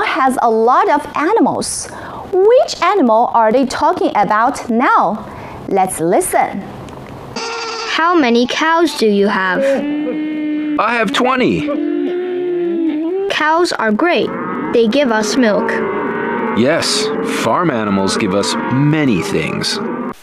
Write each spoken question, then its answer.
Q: Which animal are they talking about now?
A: They are talking about cows.